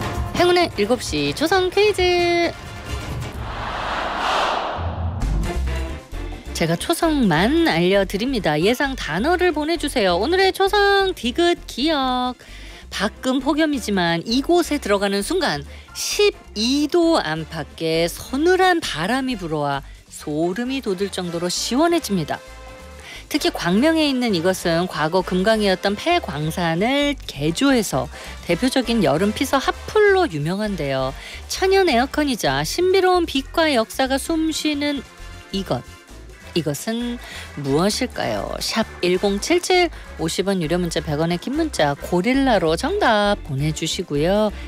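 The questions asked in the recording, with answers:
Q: 이것은 무엇일까요?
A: 동굴 (광명동굴)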